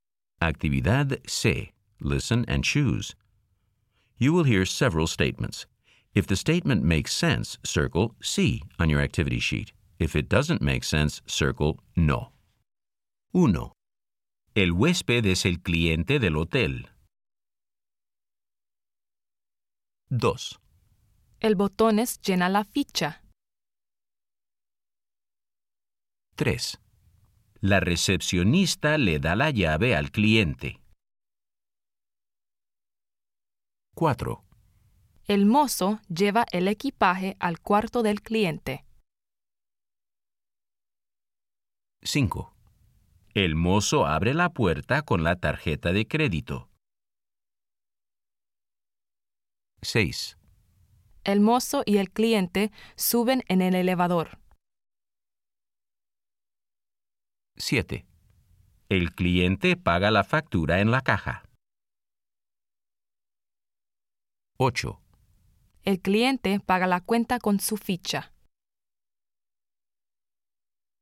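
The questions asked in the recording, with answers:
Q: El huésped es el cliente del hotel.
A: Sí

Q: El botón es llena la ficha.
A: No

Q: La recepcionista le da la llave al cliente.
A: Sí

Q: El mozo lleva el equipaje al cuarto del cliente.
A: Sí

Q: El mozo abre la puerta con la tarjeta de crédito.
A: No

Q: El mozo y el cliente suben en el elevador.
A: Sí

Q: El cliente paga la factura en la caja.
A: Sí

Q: El cliente paga la cuenta con su ficha.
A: No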